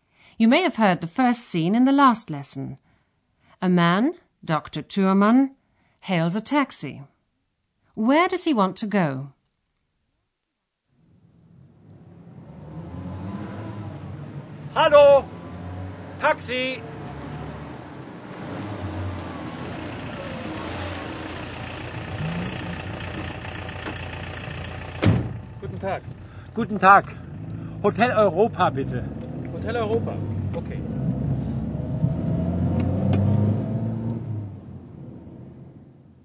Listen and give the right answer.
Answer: Dr. Thürmann asks the taxi driver to take him to a hotel, the Hotel Europa.